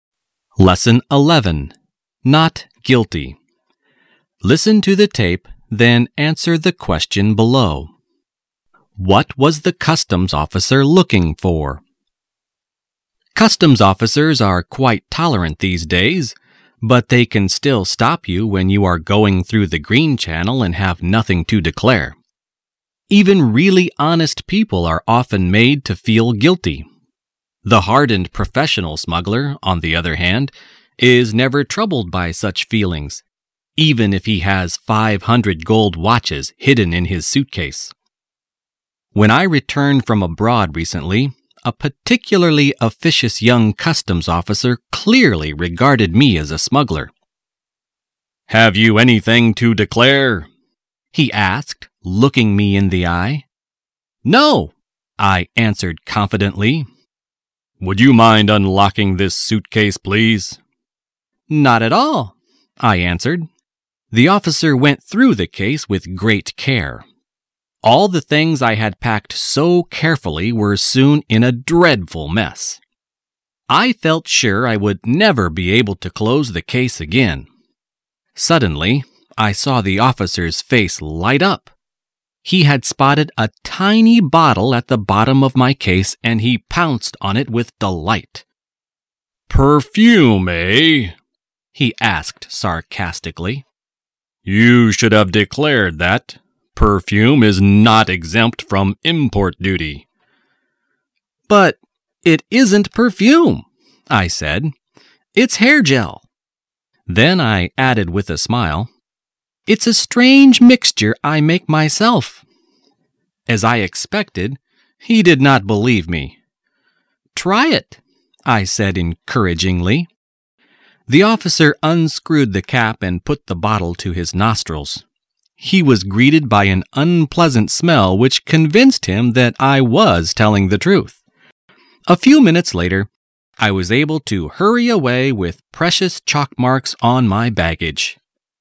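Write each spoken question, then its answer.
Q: What was the customs officer looking for?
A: Smuggled goods (he suspected the bottle was perfume that should have been declared)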